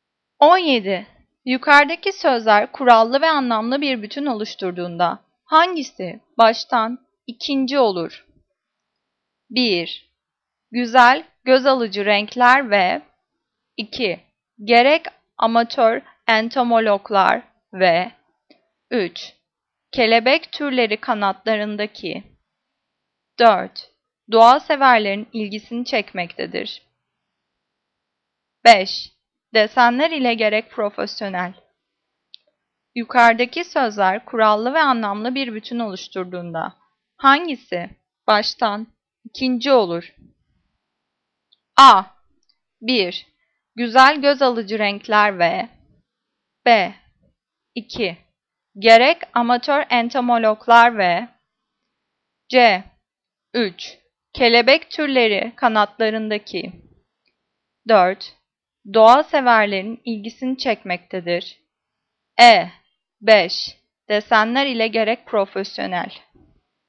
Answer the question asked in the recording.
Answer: Cevap A. 1. Güzel göz alıcı renkler ve